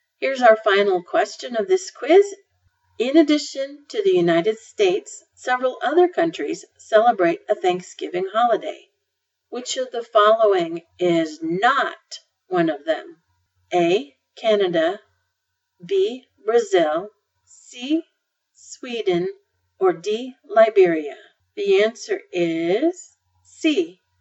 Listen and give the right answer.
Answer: The answer is C.